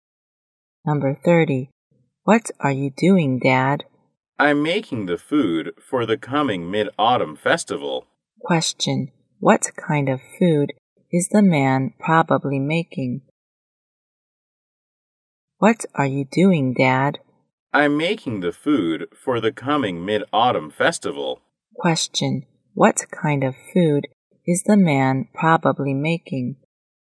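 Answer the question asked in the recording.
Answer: Mooncakes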